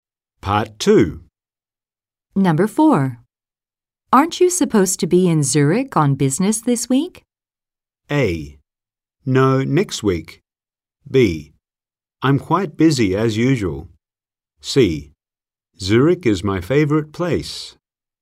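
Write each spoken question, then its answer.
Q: Aren't you supposed to be in Zurich on business this week?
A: A: No, next week.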